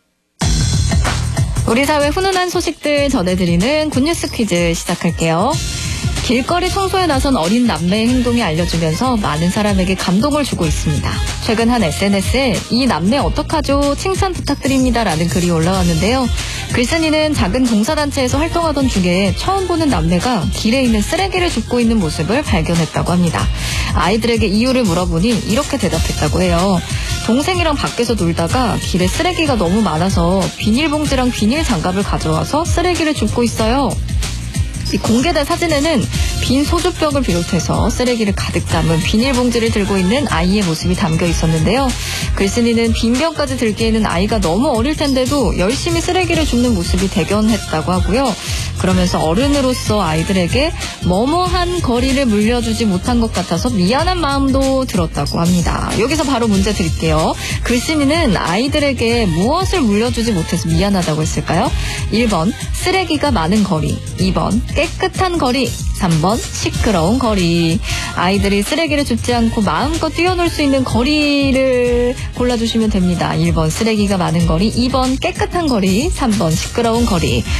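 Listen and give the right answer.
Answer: 2번: 깨끗한 거리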